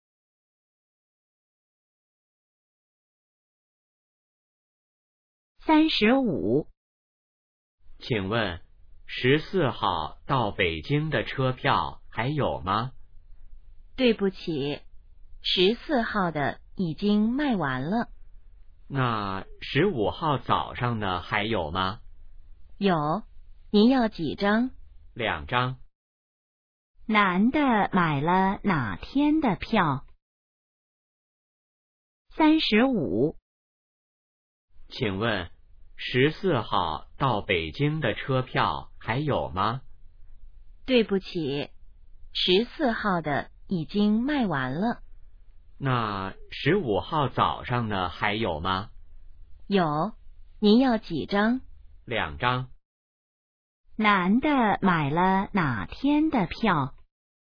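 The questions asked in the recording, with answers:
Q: 男的买了哪天的票?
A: 15号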